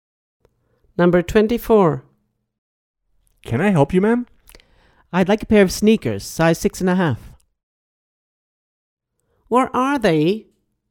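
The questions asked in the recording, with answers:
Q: Where are they?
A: in a shoe store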